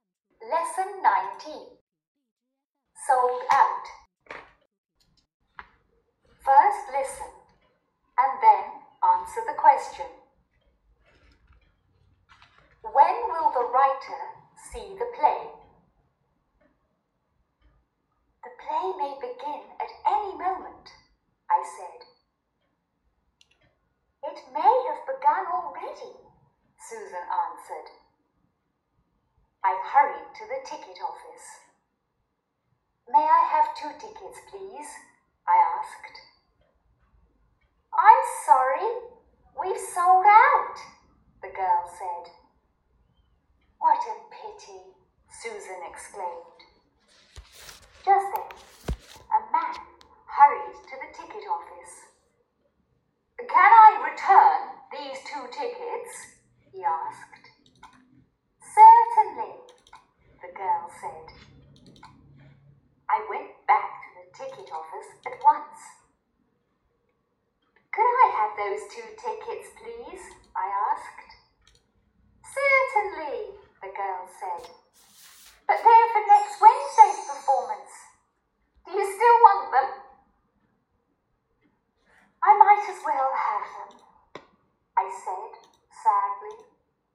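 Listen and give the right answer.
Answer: Next Wednesday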